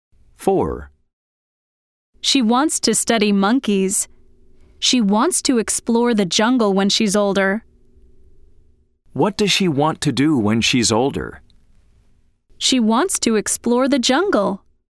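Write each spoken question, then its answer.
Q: What does she want to do when she's older?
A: True: She wants to explore the jungle.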